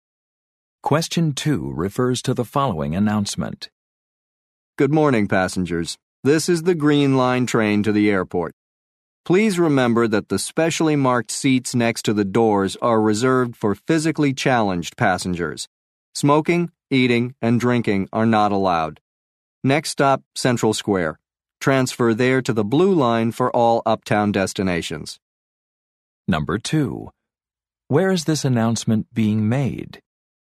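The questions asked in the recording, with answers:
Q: Where is this announcement being made?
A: On a train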